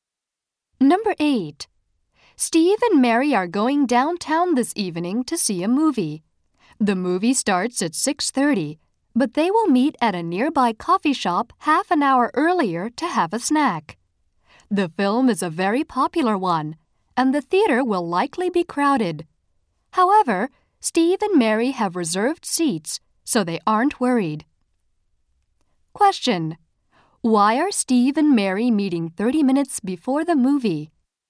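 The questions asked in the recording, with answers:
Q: Why are Steve and Mary meeting 30 minutes before the movie?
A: To have a snack at a coffee shop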